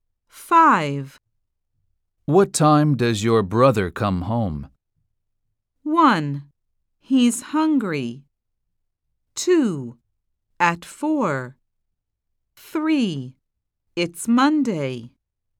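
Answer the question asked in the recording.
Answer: 2: At 4.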